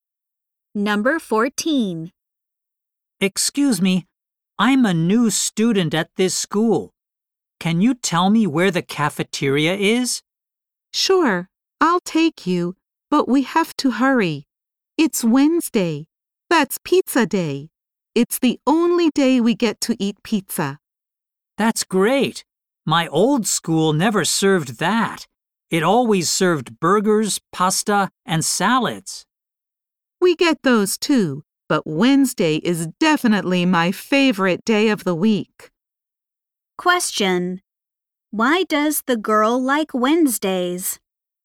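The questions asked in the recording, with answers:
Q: Why does the girl like Wednesdays?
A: It is pizza day in the cafeteria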